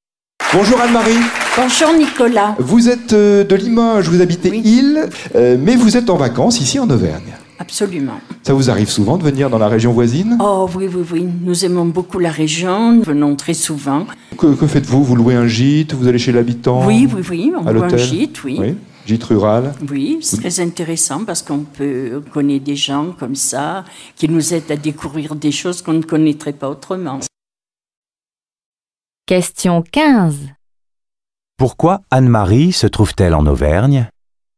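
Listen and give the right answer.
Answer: Elle est en vacances (dans un gîte rural).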